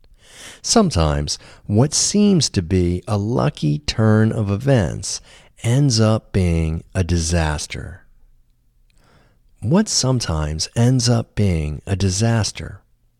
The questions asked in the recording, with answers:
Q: What sometimes ends up being a disaster?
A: Sometimes what seems to be a lucky turn of events ends up being a disaster.